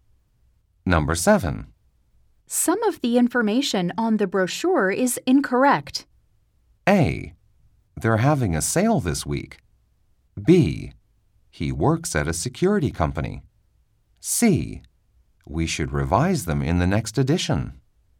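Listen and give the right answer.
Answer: C: We should revise them in the next edition.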